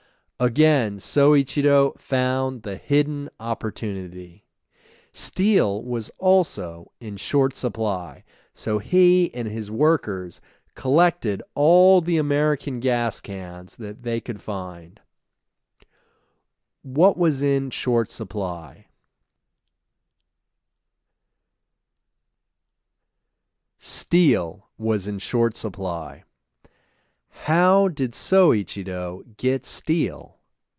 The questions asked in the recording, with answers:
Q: How did Soichiro get steel?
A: He collected all the American gas cans he could find.